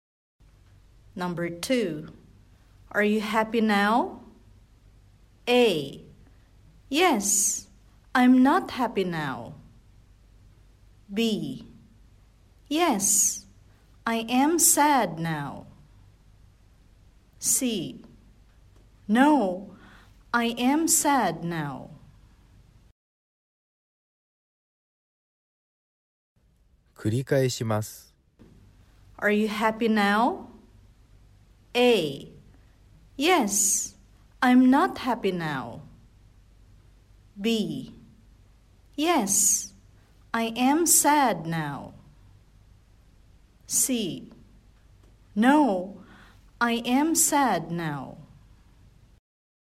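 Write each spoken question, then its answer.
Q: Are you happy now?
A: C: No, I am sad now.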